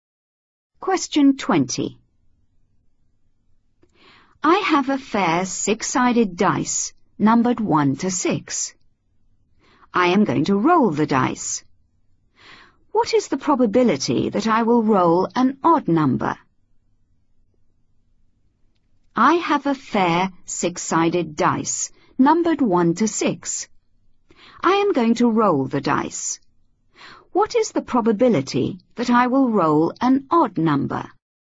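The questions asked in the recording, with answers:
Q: What is the probability that I will roll an odd number?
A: 1/2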